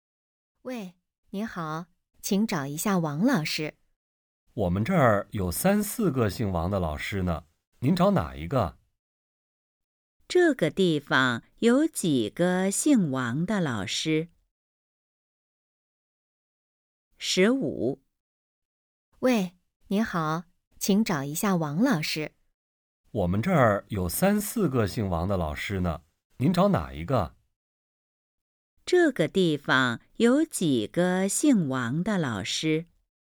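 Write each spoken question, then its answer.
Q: 这个地方有几个姓王的老师?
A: 三四个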